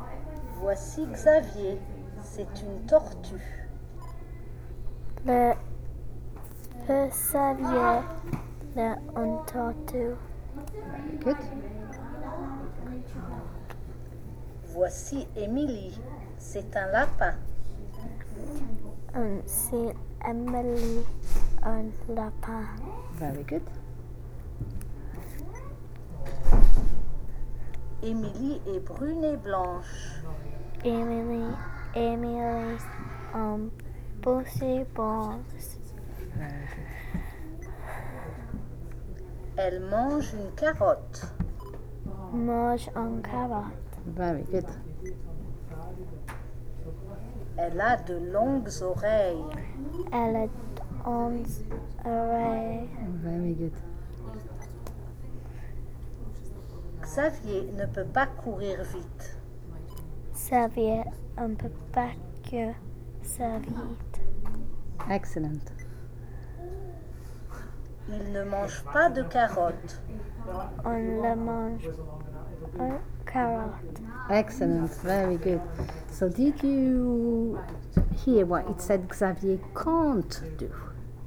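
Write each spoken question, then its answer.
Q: So did you hear what it said Xavier can't do?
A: Run fast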